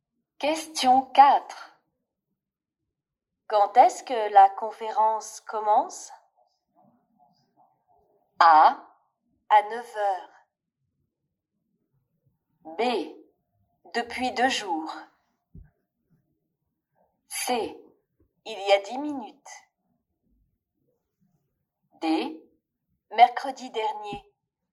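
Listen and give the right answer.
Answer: A: À 9 h.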